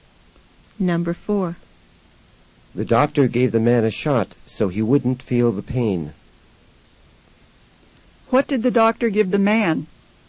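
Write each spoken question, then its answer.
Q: What did the doctor give the man?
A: A shot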